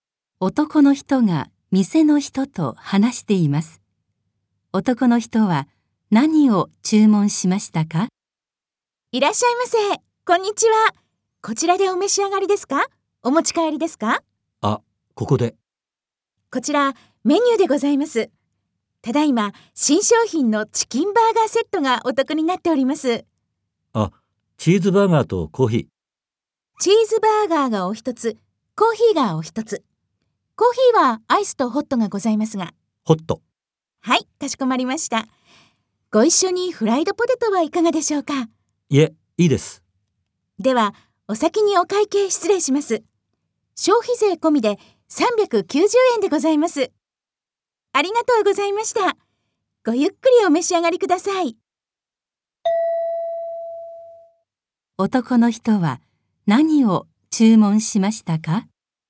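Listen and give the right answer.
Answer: チーズバーガーとホットコーヒー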